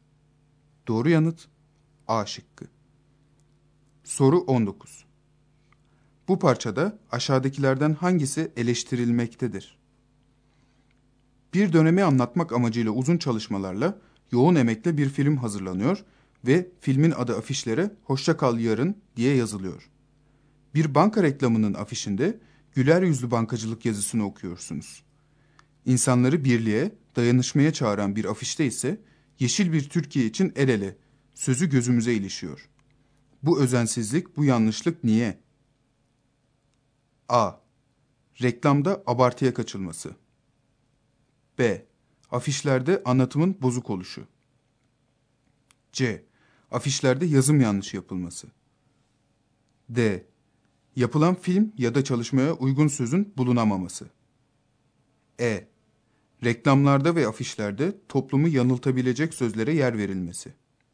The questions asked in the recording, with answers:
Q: Bu parçada aşağıdakilerden hangisi eleştirilmektedir?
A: Doğru yanıt C şıkkı.